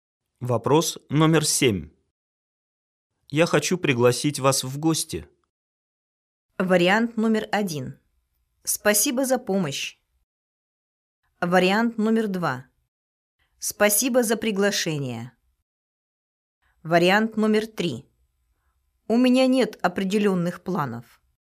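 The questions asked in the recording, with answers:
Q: Я хочу пригласить вас в гости.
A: 2: Спасибо за приглашение.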